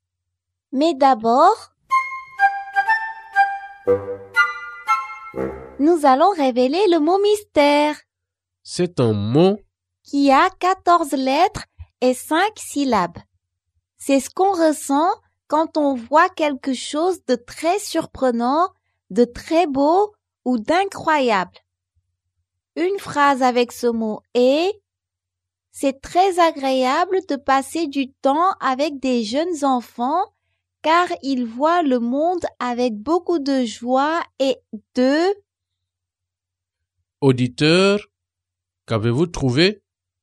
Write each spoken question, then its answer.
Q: Auditeur, qu'avez-vous trouvé?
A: Le mot mystère est émerveillement.